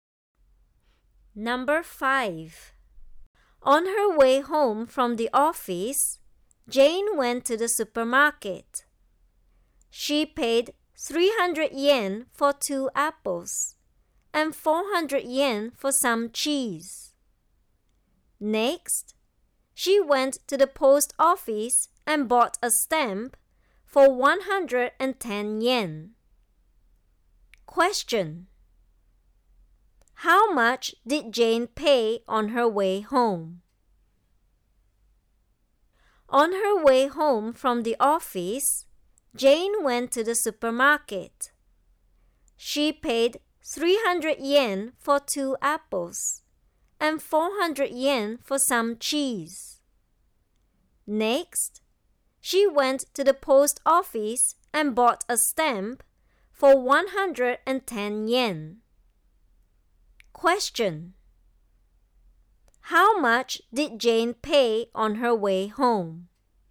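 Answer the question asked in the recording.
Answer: 810 yen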